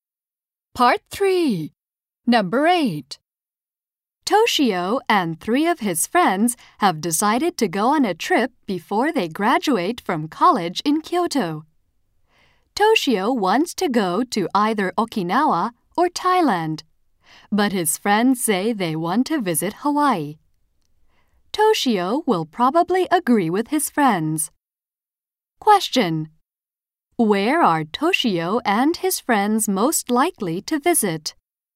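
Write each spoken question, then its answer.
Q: Where are Toshio and his friends most likely to visit?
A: Hawaii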